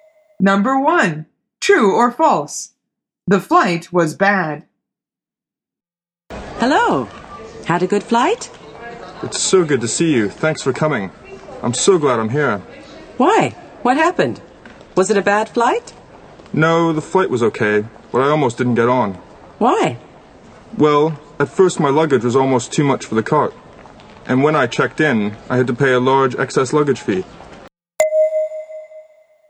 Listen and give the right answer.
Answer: The answer is false. Bob says, the flight was okay.